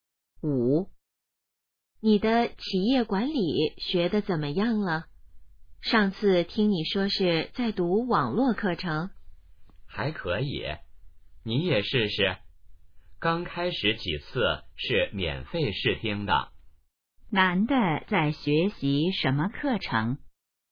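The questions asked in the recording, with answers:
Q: 男的在学习什么课程?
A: 企业管理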